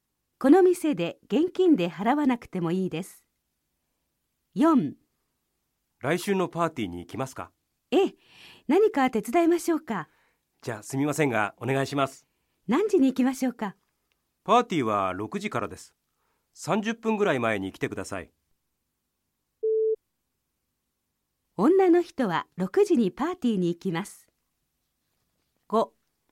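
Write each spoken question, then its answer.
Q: 女の人は6時にパーティーに行きます。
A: ×(5時半ごろ行きます)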